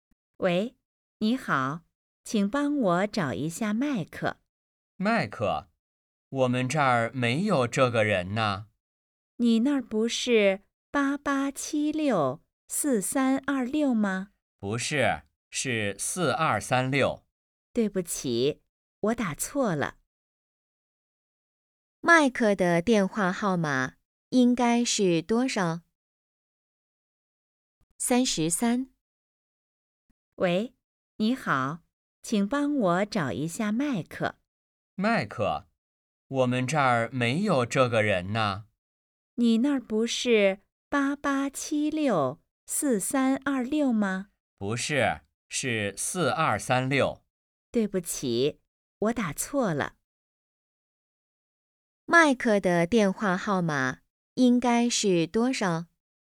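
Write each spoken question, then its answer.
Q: 麦克的电话号码应该是多少?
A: 88764326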